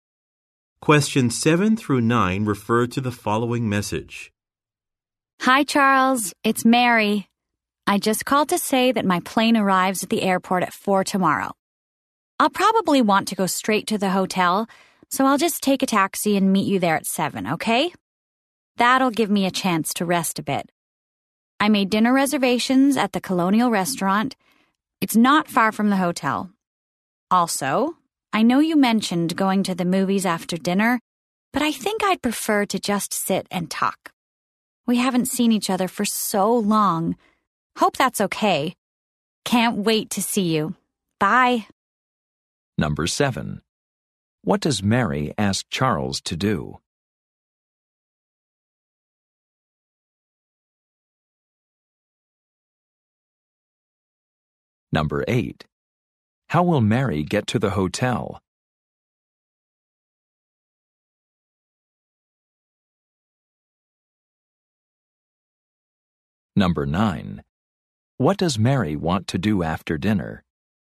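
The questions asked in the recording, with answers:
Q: What does Mary ask Charles to do?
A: Meet her at the hotel at 7

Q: How will Mary get to the hotel?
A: By taxi

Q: What does Mary want to do after dinner?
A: Sit and talk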